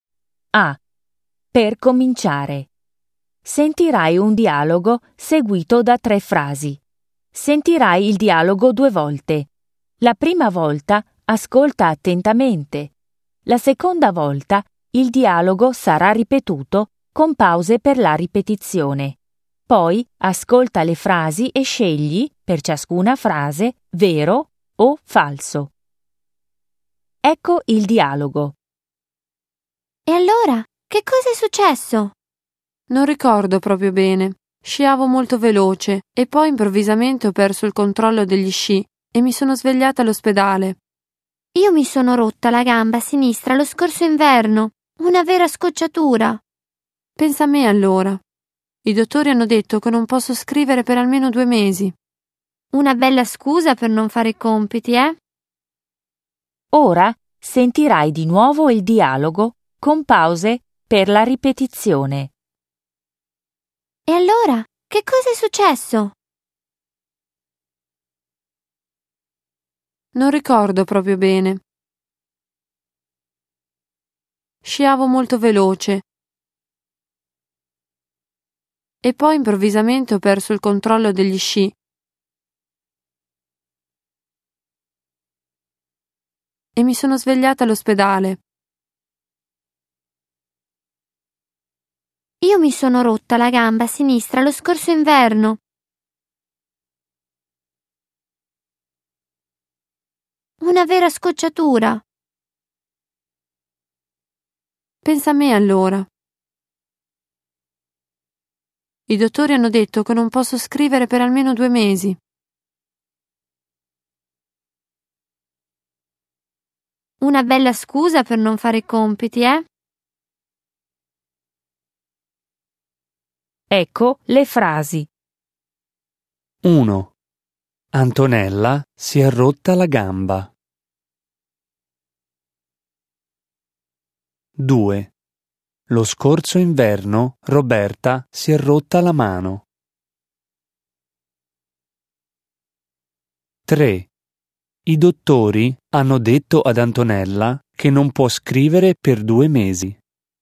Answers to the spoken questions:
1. 1. Falso.
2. 2. Falso.
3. 3. Vero.